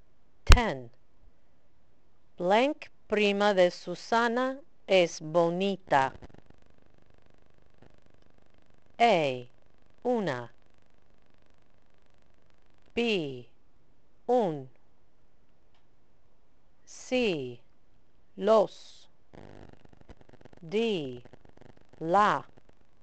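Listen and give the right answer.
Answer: D: La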